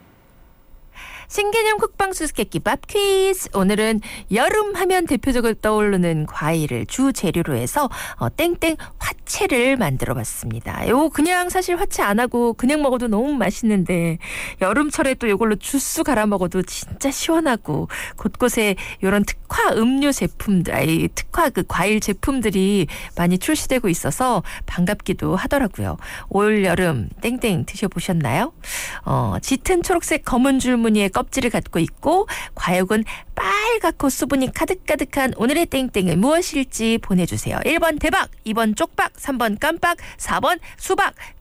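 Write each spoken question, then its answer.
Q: 짙은 초록색 검은 줄무늬 껍질을 갖고 있고 과육은 빨갛고 수분이 가득가득한 오늘의 땡땡은 무엇일지 보내주세요.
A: 4: 수박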